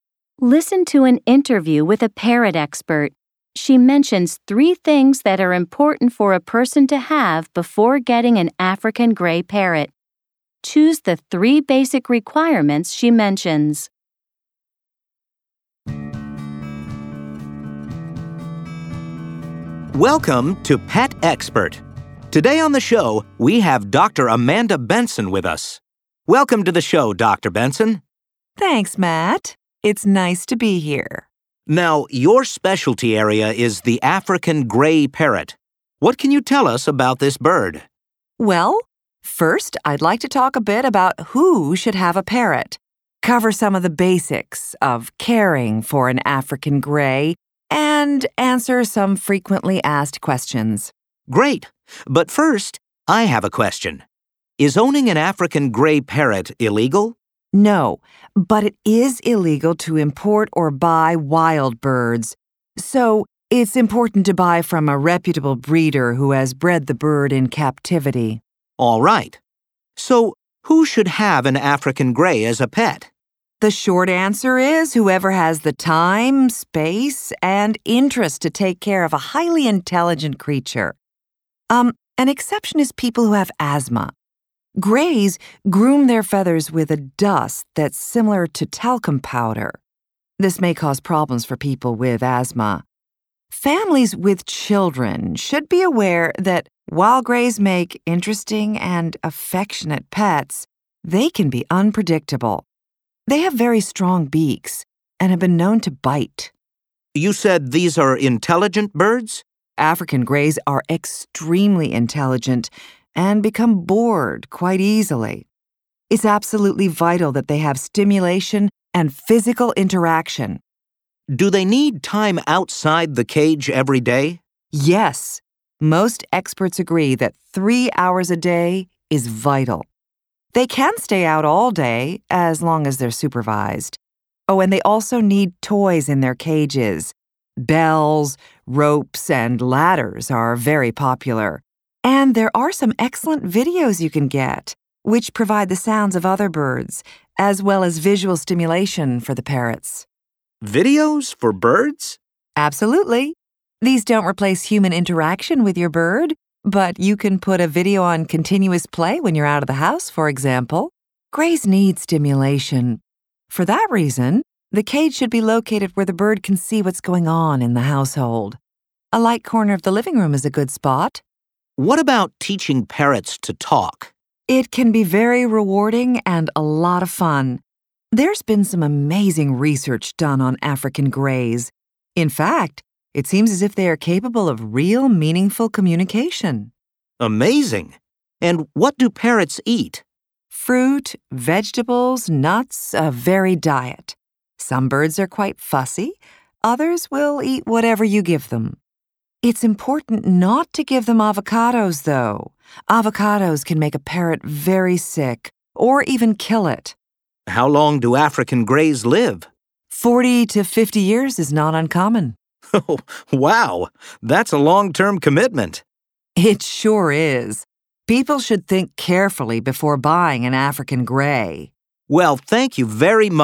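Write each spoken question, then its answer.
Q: Choose the three basic requirements she mentions.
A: time, space, and interest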